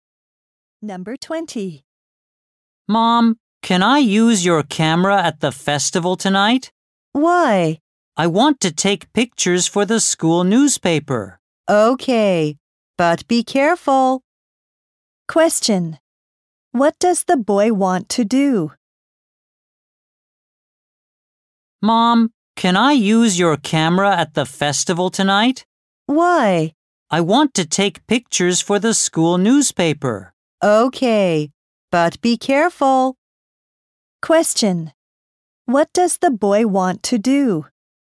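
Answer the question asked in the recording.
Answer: Take pictures for the school newspaper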